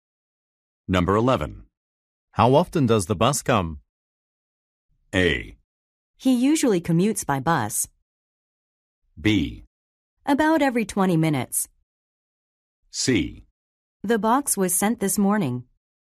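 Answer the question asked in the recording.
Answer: B: About every 20 minutes.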